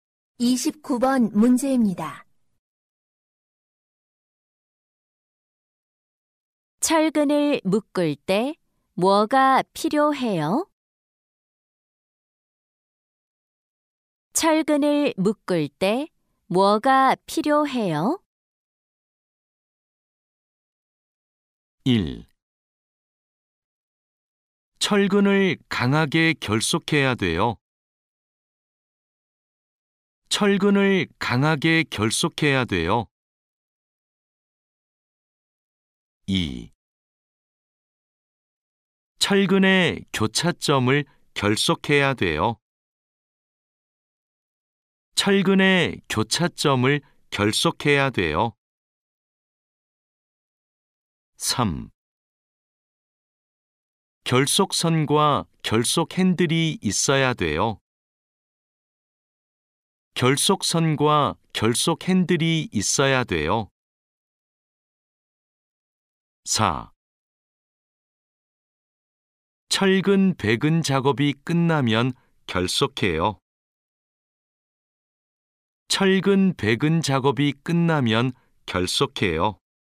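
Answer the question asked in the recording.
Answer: 3: 결속선과 결속 핸들이 있어야 돼요.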